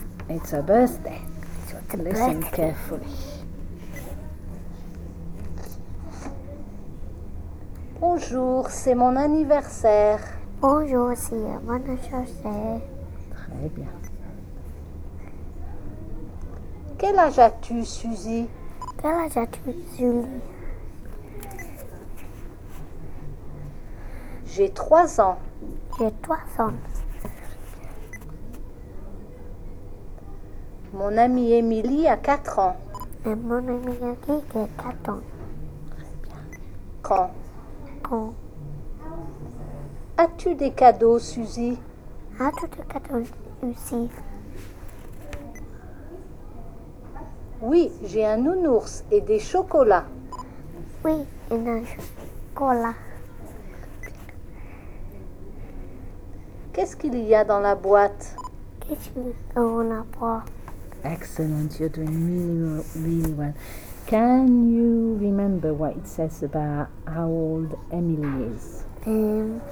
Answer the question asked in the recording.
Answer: Mon amie Emily a 4 ans.